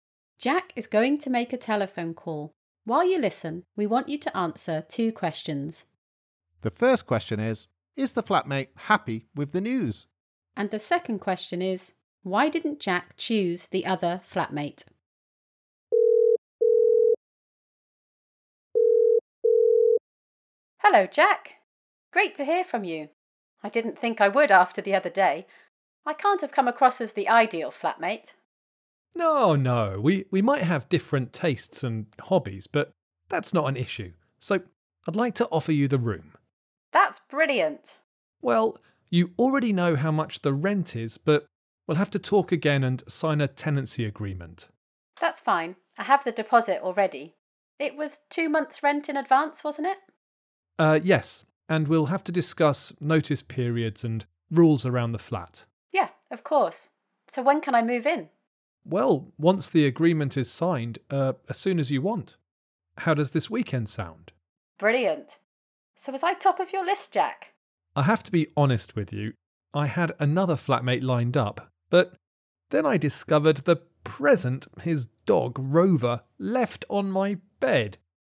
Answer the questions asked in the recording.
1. She was very happy. She was surprised because she thought she hadn't made a good impression in the interview.
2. Well, I was already a bit unsure about having pets in my flat.